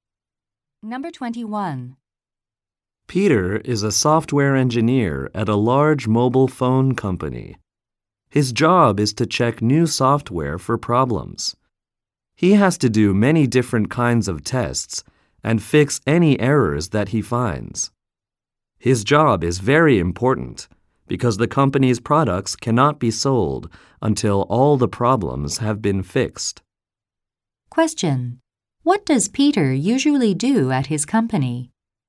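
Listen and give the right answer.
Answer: He checks new software for problems and fixes errors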